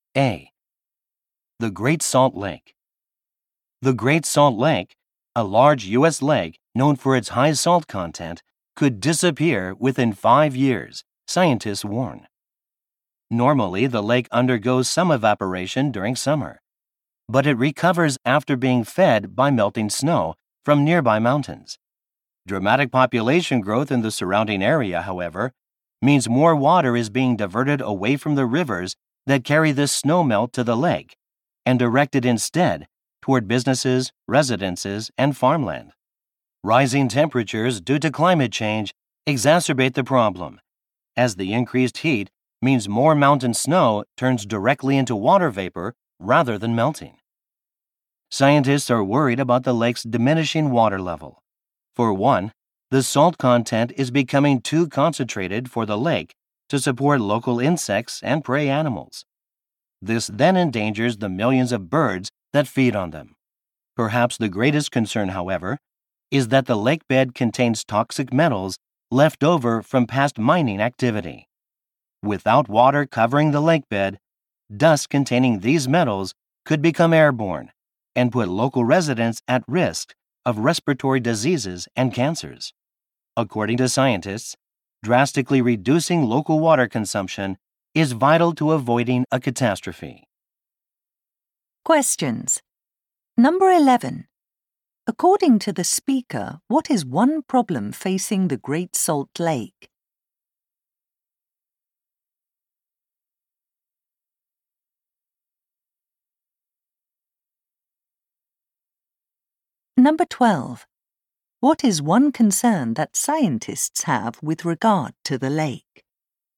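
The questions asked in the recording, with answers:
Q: According to the speaker, what is one problem facing the Great Salt Lake?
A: Population growth diverts water away from the rivers that feed the lake, and it could disappear within 5 years

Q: What is one concern that scientists have with regard to the lake?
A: Dust containing toxic metals from the exposed lake bed could harm residents' health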